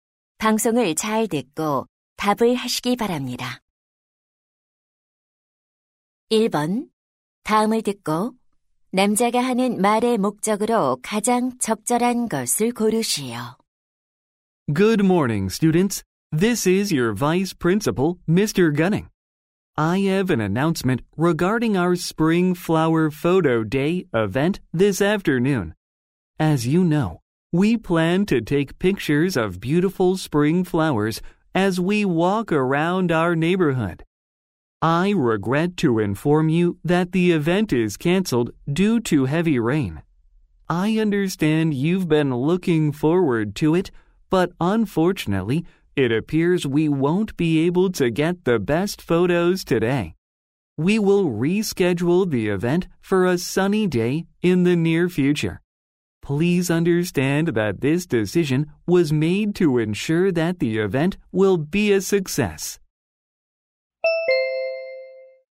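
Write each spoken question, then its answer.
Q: 다음을 듣고 남자가 하는 말의 목적으로 가장 적절한 것을 고르시오.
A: 폭우로 봄꽃 사진 촬영 행사가 취소되었음을 알리려고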